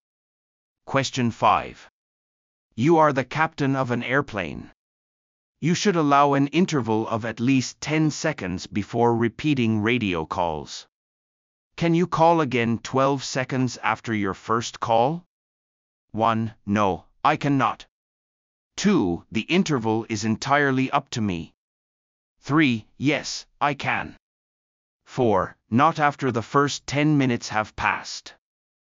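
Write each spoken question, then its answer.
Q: Can you call again 12 seconds after your first call?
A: 3: Yes, I can.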